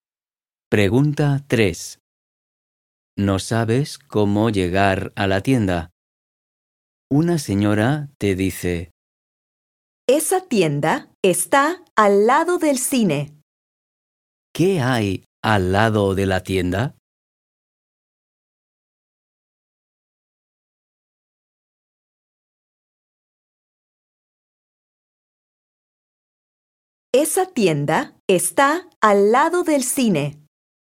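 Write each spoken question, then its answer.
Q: ¿Qué hay al lado de la tienda?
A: el cine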